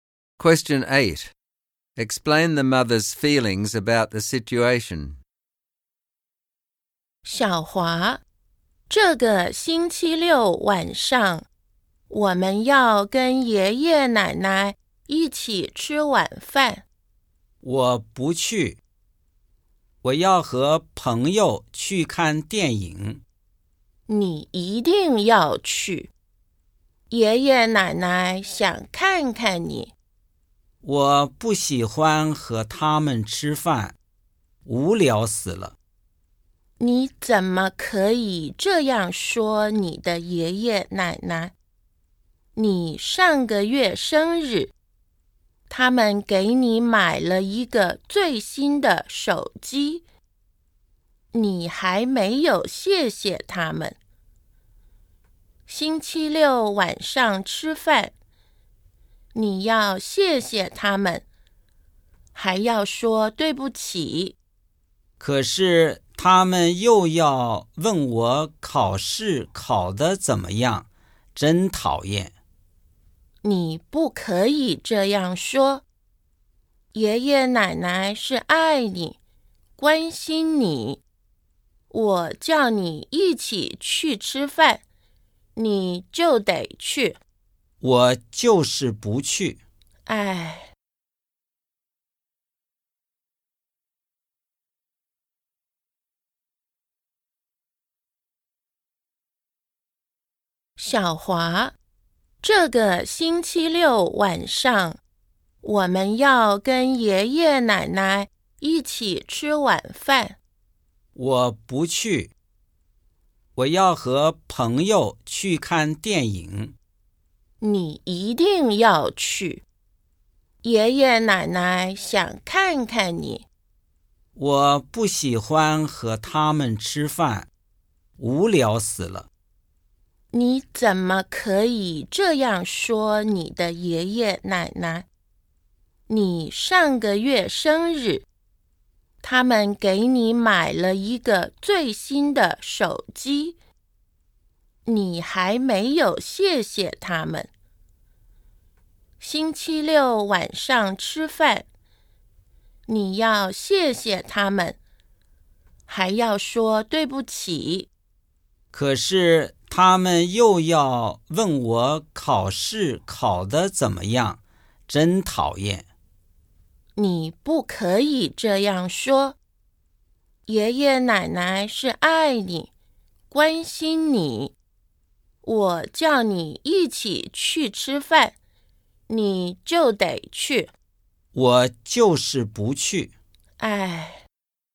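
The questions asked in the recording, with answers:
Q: Explain the mother's feelings about the situation.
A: She is angry and frustrated that Xiaohua is being disrespectful and ungrateful to his grandparents and refuses to go to dinner.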